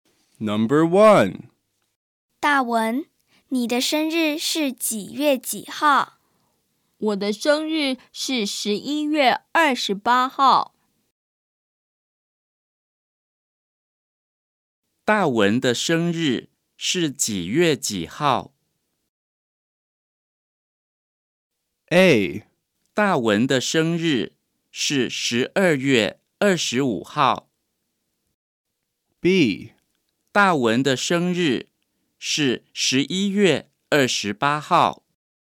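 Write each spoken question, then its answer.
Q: 大文的生日是几月几号?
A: B: 大文的生日是11月28号。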